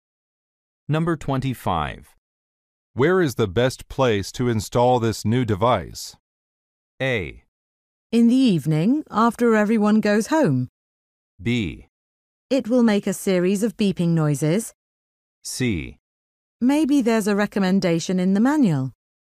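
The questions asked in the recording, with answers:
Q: Where is the best place to install this new device?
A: C: Maybe there's a recommendation in the manual.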